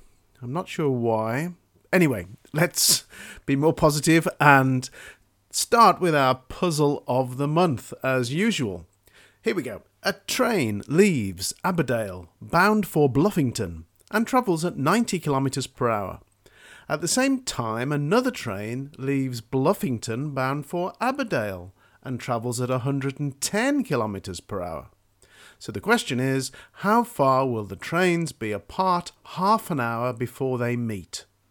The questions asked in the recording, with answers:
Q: So the question is, how far will the trains be apart half an hour before they meet?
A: So, the answer is the trains will be 100 kilometres apart half an hour before they meet.